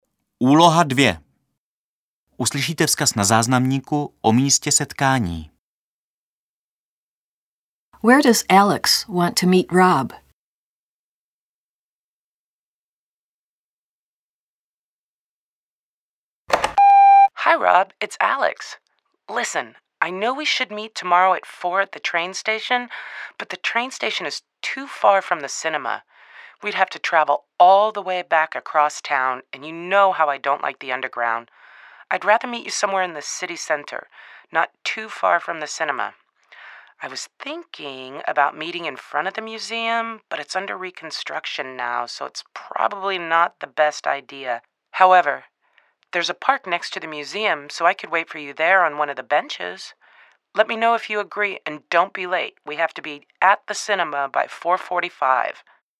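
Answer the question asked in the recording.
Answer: In the park next to the museum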